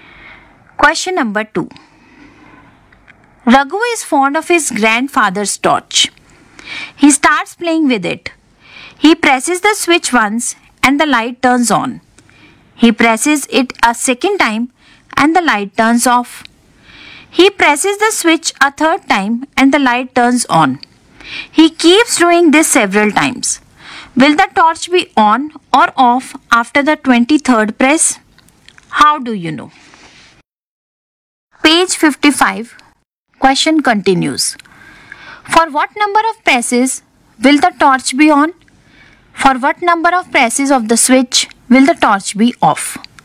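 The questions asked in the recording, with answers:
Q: Will the torch be on or off after the 23rd press?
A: On

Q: For what number of presses will the torch be on?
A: Odd numbers of presses

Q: For what number of presses of the switch will the torch be off?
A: Even numbers of presses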